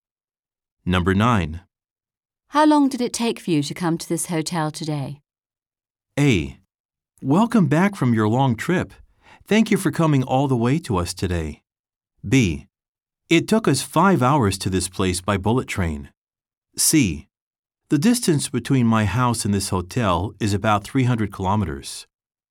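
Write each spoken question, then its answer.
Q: How long did it take for you to come to this hotel today?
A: B: It took us 5 hours to this place by bullet train.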